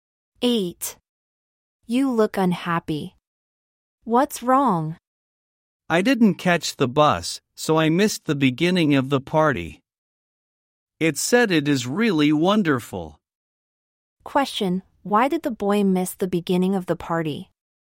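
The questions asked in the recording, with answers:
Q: Why did the boy miss the beginning of the party?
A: He didn't catch the bus.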